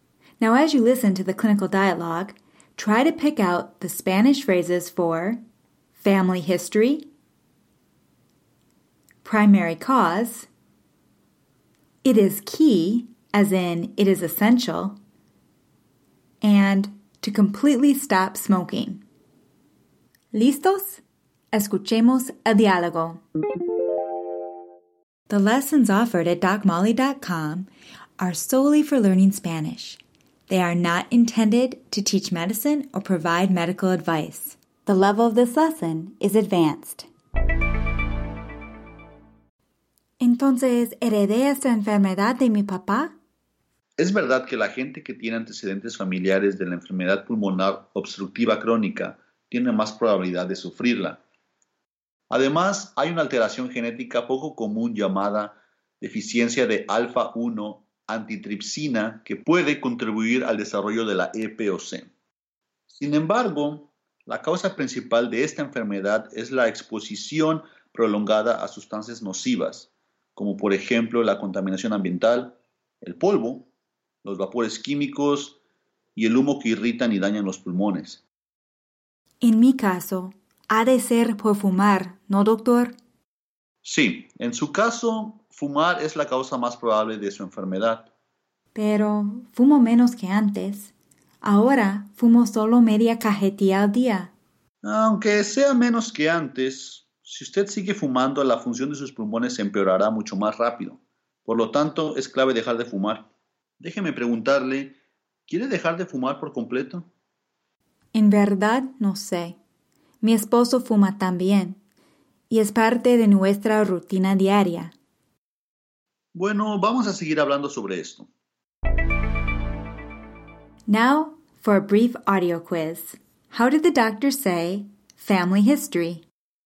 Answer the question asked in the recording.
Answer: Los antecedentes familiares.